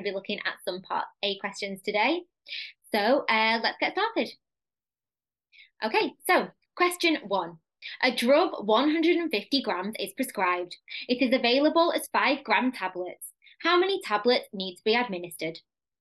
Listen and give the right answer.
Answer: you would then have to give 30 tablets